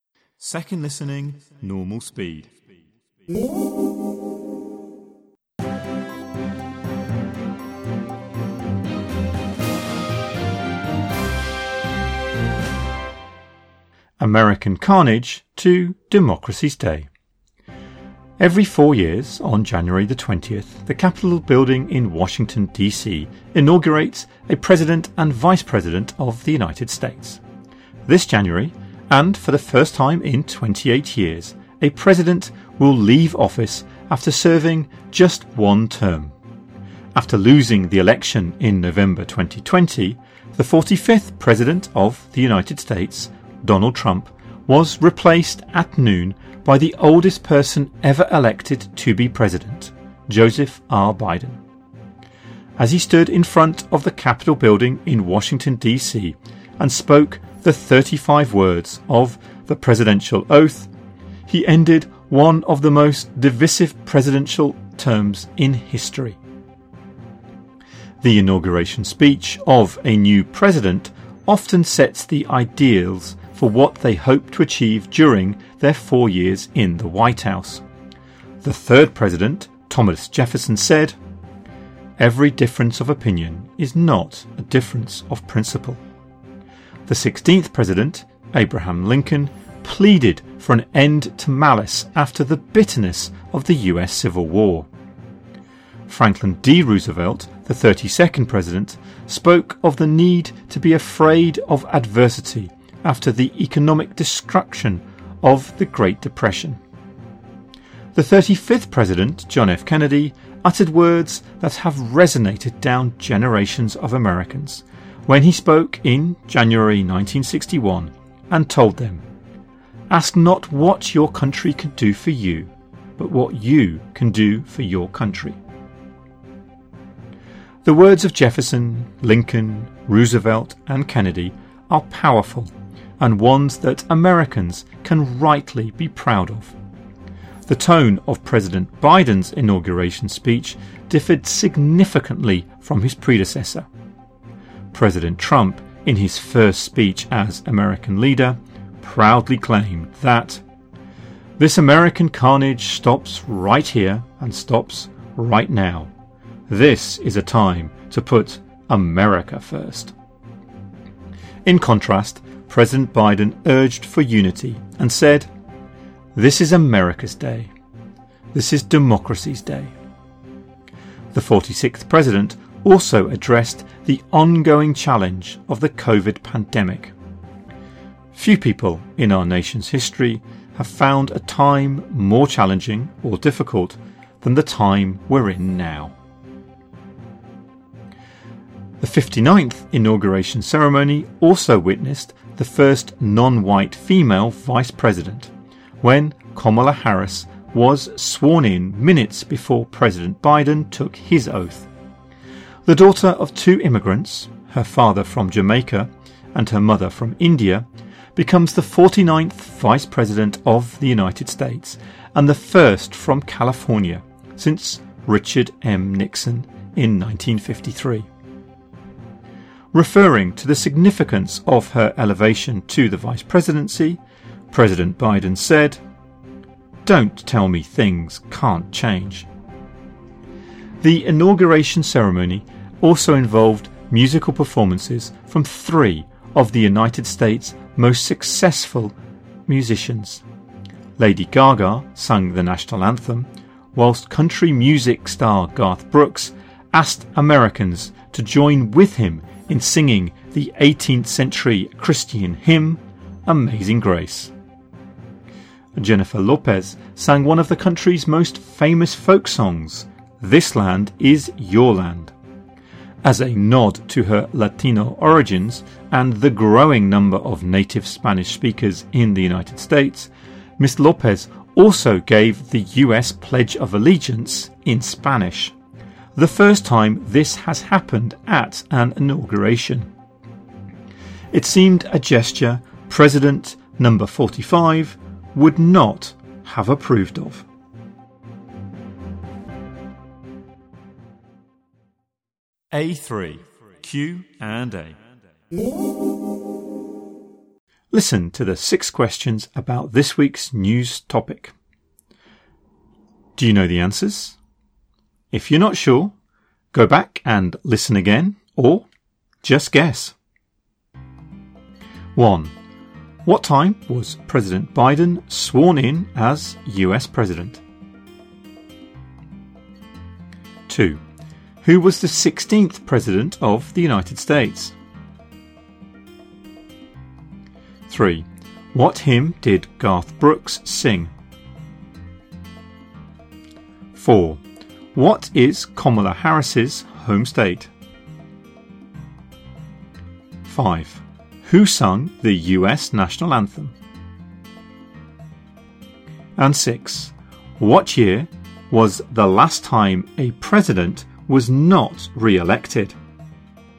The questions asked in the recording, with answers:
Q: What time was President Biden sworn in as US President?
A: 1. Noon.

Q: Who was the 16th President of the United States?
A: 2. Abraham Lincoln.

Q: What is Kamala Harris's home state?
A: 4. California.

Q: What year was the last time a president was not re elected?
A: 6. 1992. George Herbert Walker Bush.